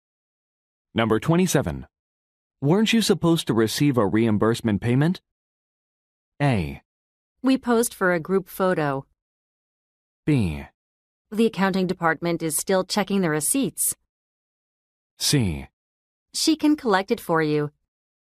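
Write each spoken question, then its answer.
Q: Weren't you supposed to receive a reimbursement payment?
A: B: The accounting department is still checking the receipts.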